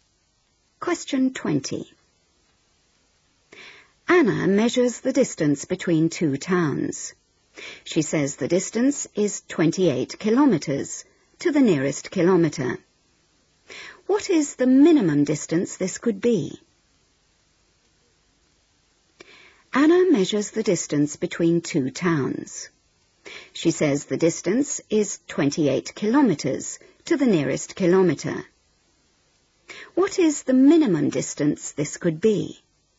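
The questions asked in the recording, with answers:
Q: What is the minimum distance this could be?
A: 27.5 km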